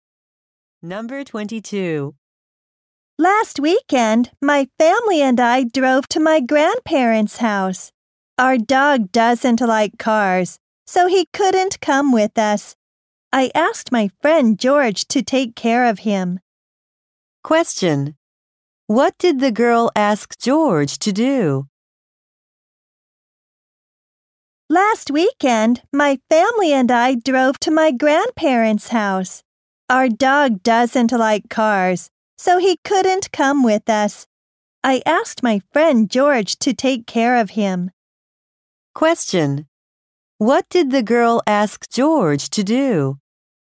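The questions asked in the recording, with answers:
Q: What did the girl ask George to do?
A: Take care of her dog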